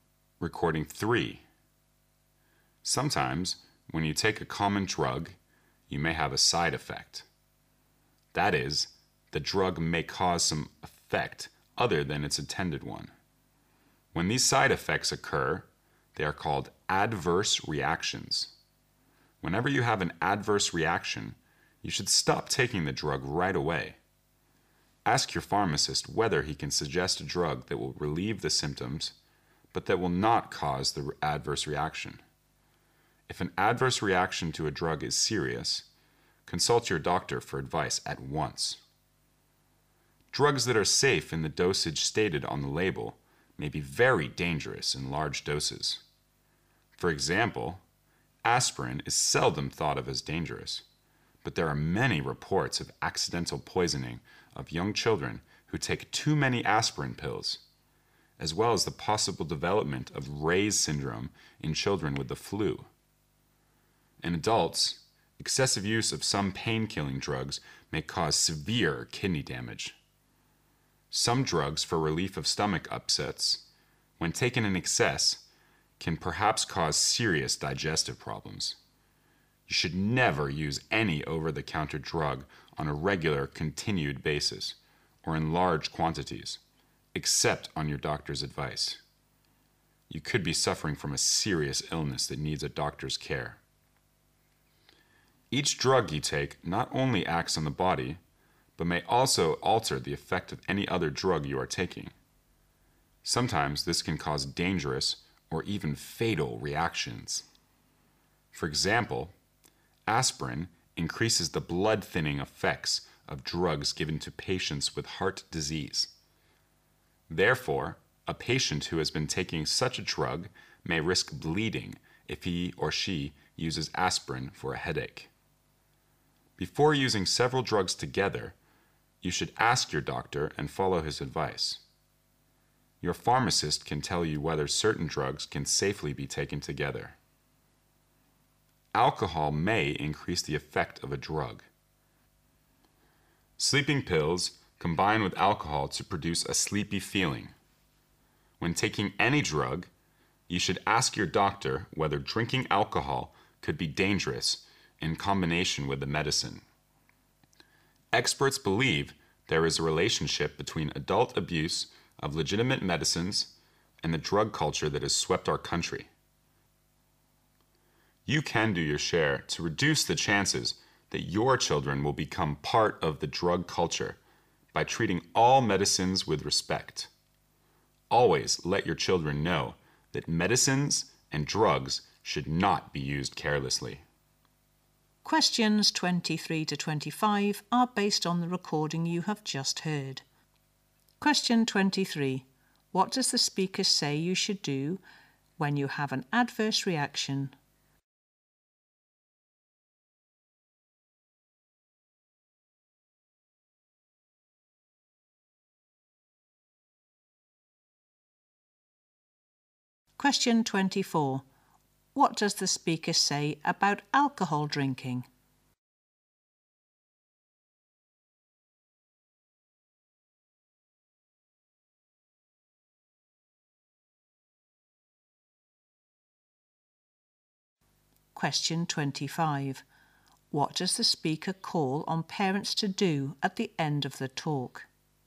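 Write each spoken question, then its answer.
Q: What does the speaker say you should do when you have an adverse reaction?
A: Stop taking the drug right away

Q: What does the speaker say about alcohol drinking?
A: It may increase the effect of a drug

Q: What does the speaker call on parents to do at the end of the talk?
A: Treat all medicines with respect and teach children not to use drugs carelessly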